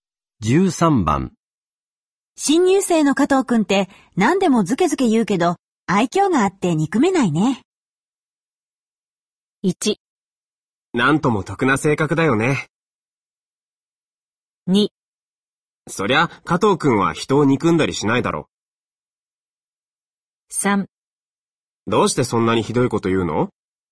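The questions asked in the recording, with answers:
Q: 新入生の加藤くんって何でもズケズケ言うけど、愛嬌があって憎めないね。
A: 1: なんとも得な性格だよね。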